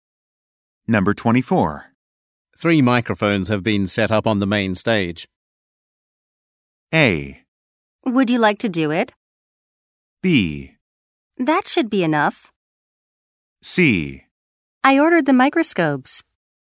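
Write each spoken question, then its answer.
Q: 3 microphones have been set up on the main stage.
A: B: That should be enough.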